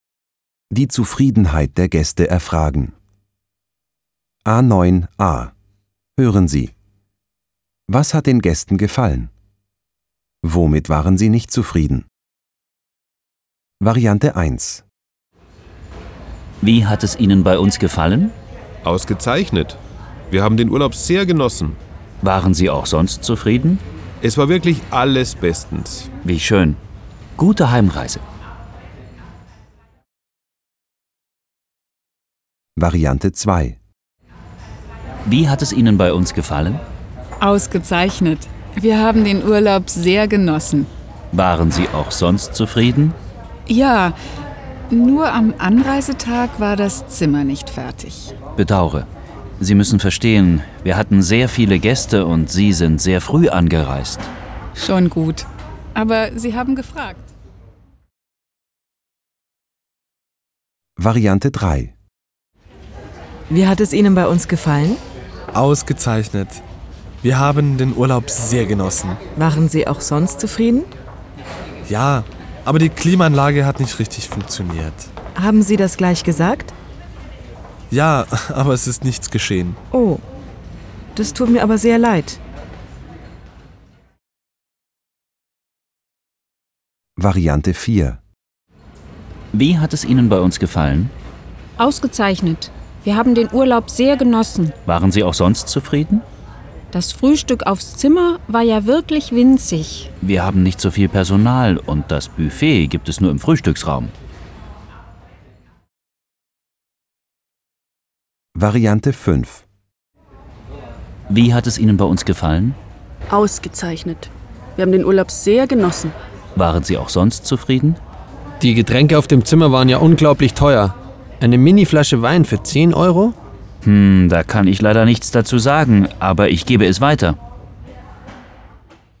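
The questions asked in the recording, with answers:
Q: Was hat den Gästen gefallen?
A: Der Urlaub insgesamt (ausgezeichnet, sehr genossen)

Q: Womit waren Sie nicht zufrieden?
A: Zimmer am Anreisetag nicht fertig; Klimaanlage funktionierte nicht; Frühstück aufs Zimmer winzig; Getränke auf dem Zimmer zu teuer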